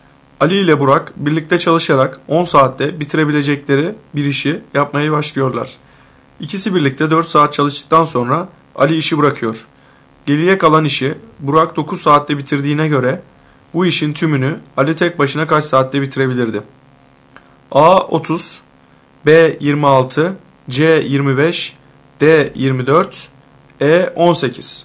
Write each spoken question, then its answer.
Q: Geriye kalan işi Burak 9 saatte bitirdiğine göre bu işin tümünü Ali tek başına kaç saatte bitirebilirdi?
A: Doğru cevap A 30.